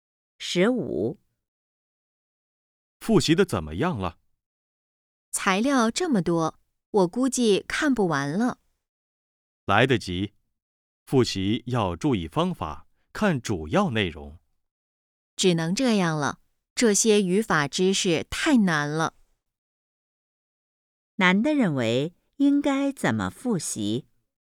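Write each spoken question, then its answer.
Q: 难的认为应该怎么复习?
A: 注意方法,看主要内容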